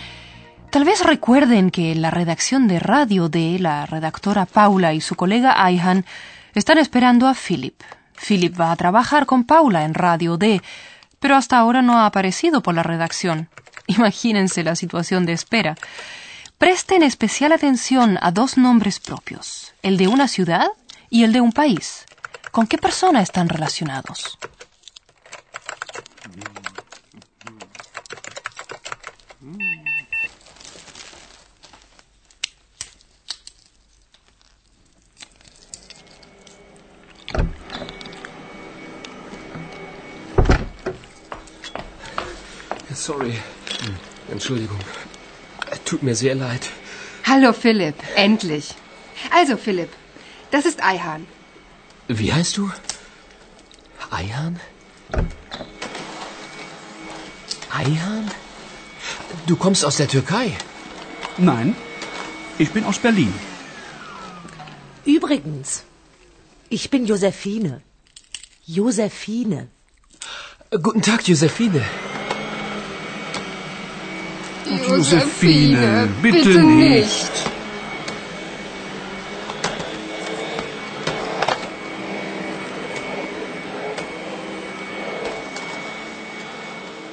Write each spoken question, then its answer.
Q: ¿Con qué persona están relacionados?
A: Lo mismo ocurre con Ayhan.